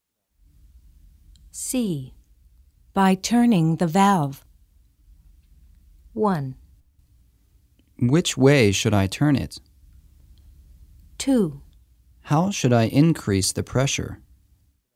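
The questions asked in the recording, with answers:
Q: By turning the valve.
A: 2: How should I increase the pressure?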